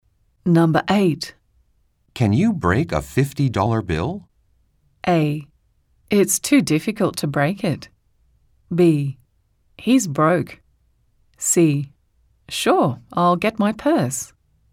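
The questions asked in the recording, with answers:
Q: Can you break a $50 bill?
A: C: Sure, I'll get my purse.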